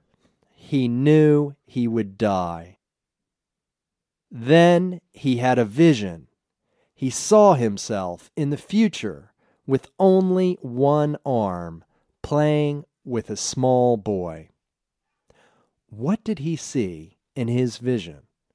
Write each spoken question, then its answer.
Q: What did he see in his vision?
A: He saw himself in the future with only one arm, playing with a small boy.